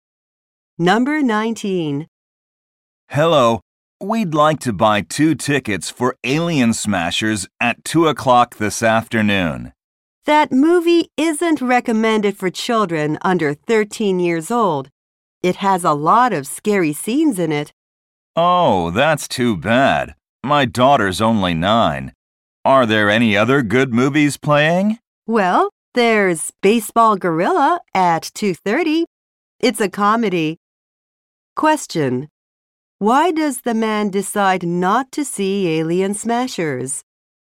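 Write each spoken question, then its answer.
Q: Why does the man decide not to see Alien Smashers?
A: His daughter is too young (the movie isn't recommended for children under 13).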